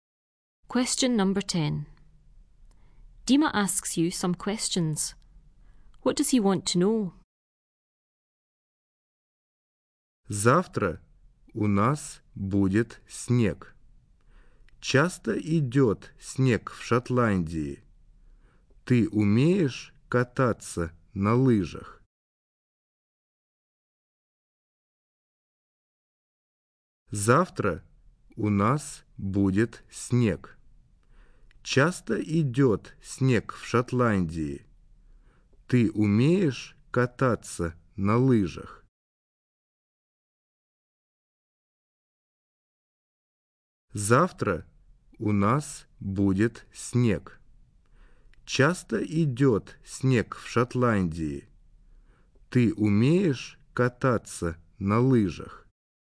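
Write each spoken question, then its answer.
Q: What does he want to know?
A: Whether it often snows in Scotland and whether you can ski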